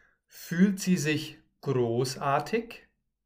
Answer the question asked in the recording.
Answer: Nein, mm -mm. sie fühlt sich nicht großartig, sondern einsam.